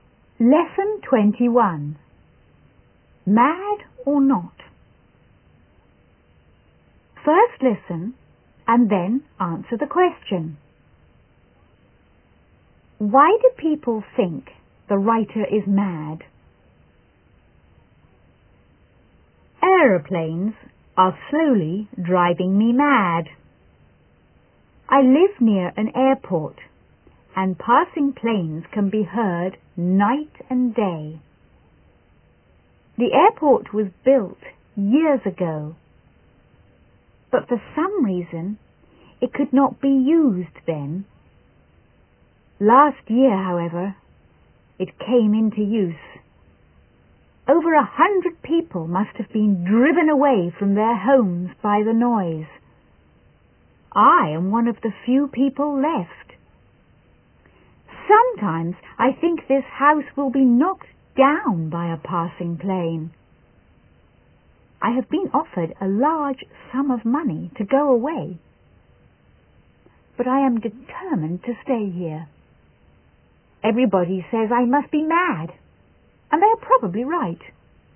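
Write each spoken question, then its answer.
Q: Why do people think the writer is mad?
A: Because he refuses to leave his noisy house near the airport, even though he has been offered a large sum of money to go away.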